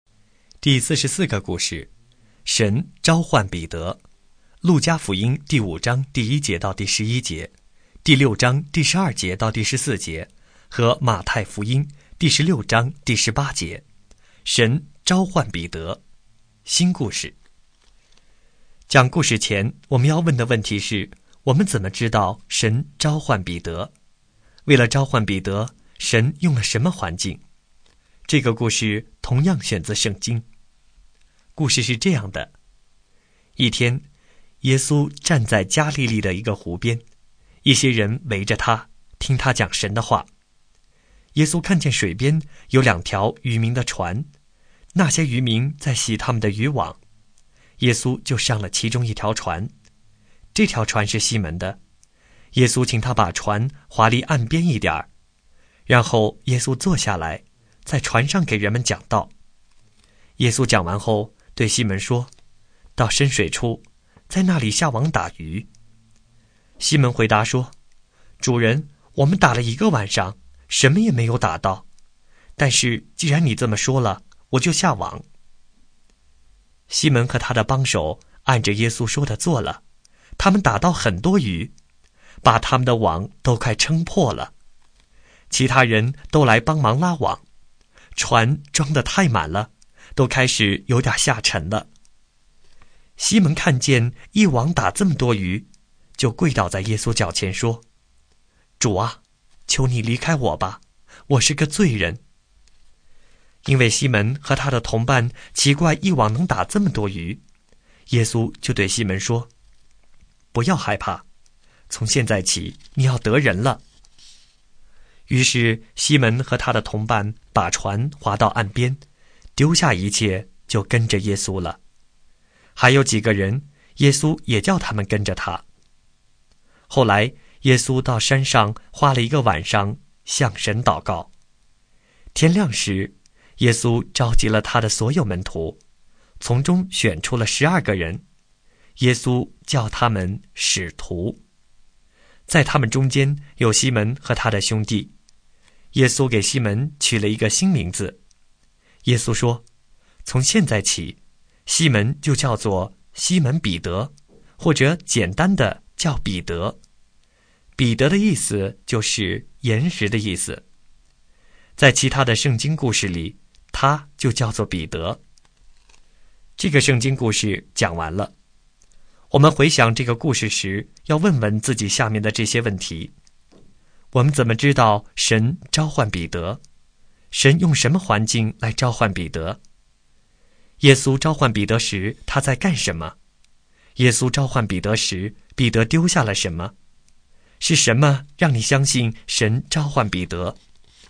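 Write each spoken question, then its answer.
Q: 耶稣召唤彼得时他在干什么?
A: 在湖边洗渔网、打鱼

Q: 耶稣召唤彼得时彼得丢下了什么?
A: 一切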